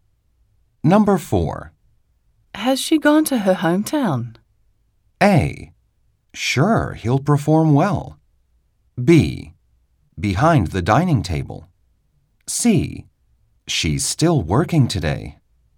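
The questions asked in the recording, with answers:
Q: Has she gone to her hometown?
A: C: She's still working today.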